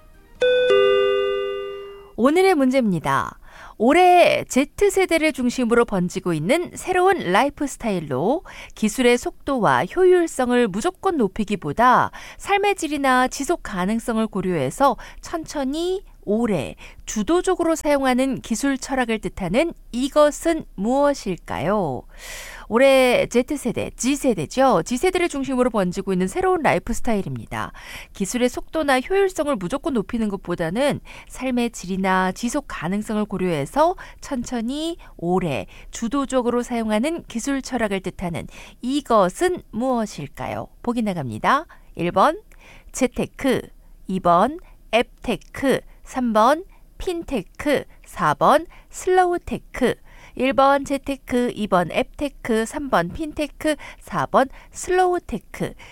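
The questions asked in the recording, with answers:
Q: 올해 Z세대를 중심으로 번지고 있는 새로운 라이프 스타일로 기술의 속도와 효율성을 무조건 높이기보다 삶의 질이나 지속 가능성을 고려해서 천천히 오래 주도적으로 사용하는 기술 철학을 뜻하는 이것은 무엇일까요?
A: 4: 슬로우테크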